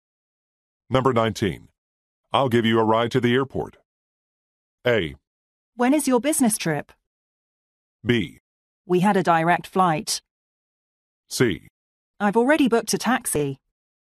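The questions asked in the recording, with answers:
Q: I'll give you a ride to the airport.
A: C: I've already booked a taxi.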